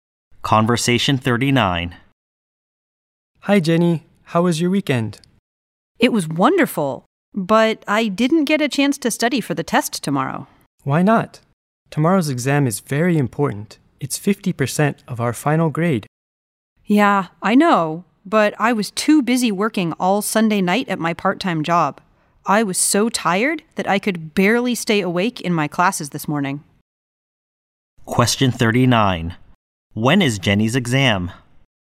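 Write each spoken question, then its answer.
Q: When is Jenny's exam?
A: Tomorrow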